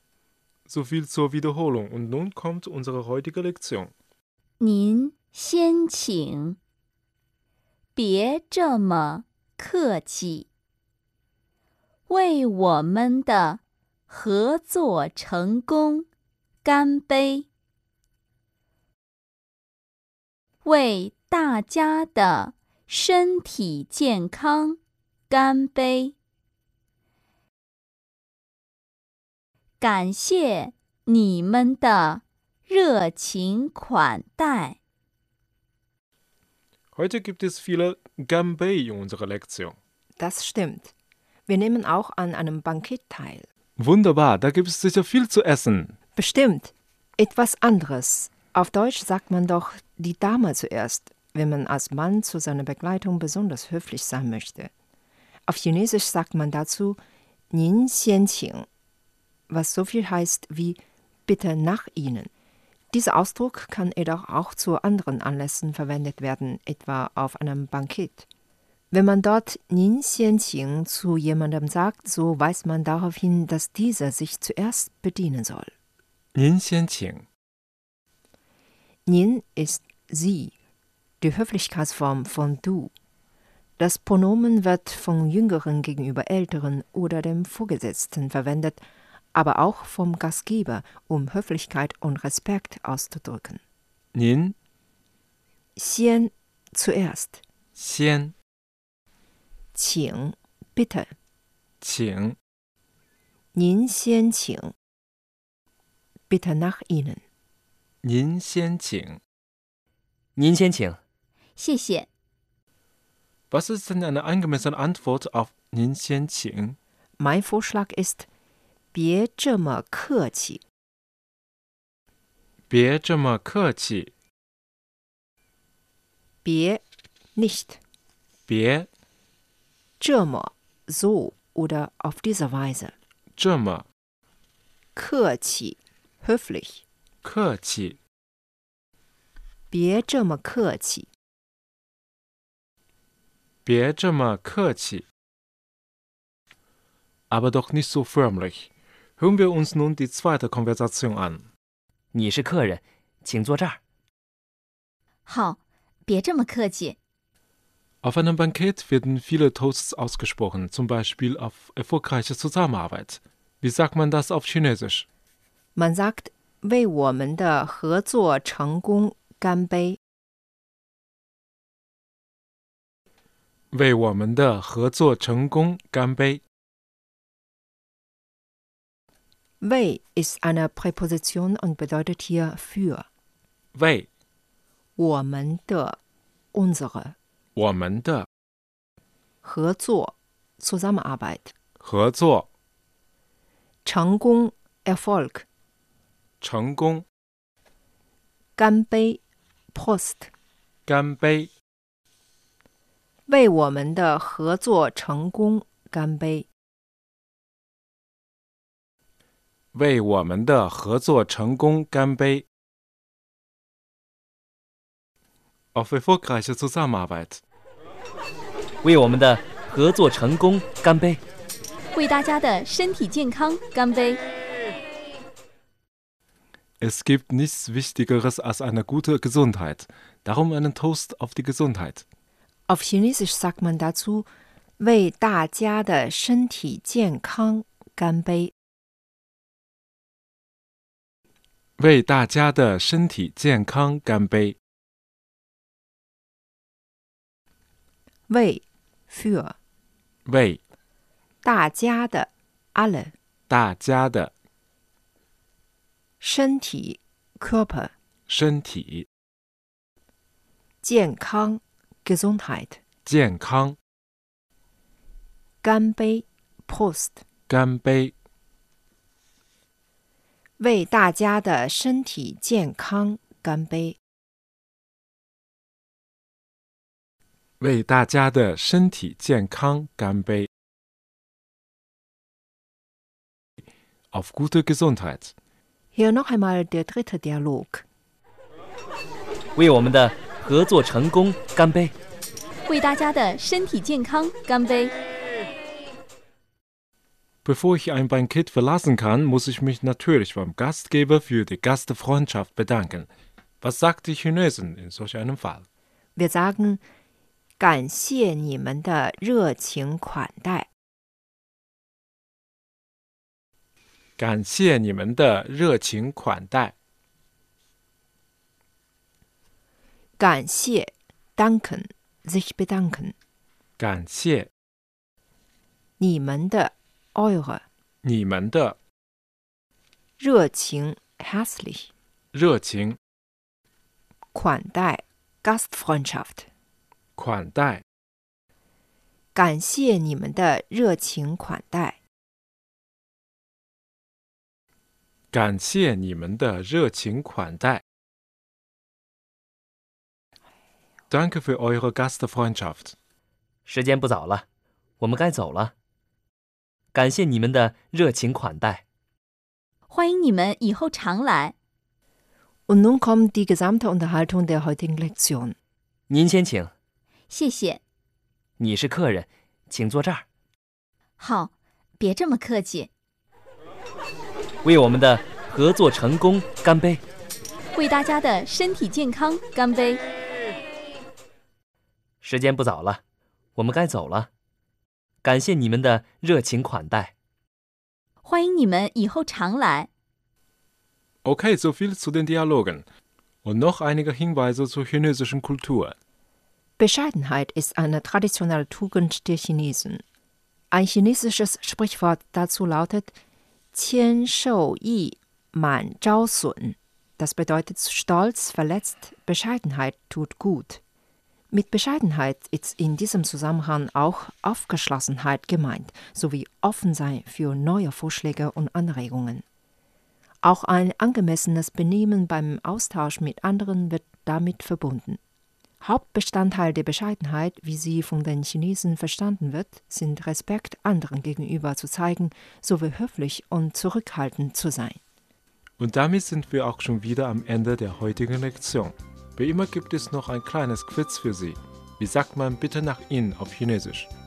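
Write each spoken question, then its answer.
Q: Wie sagt man bitte nach Ihnen auf Chinesisch?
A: 您先请 (Nin xian qing)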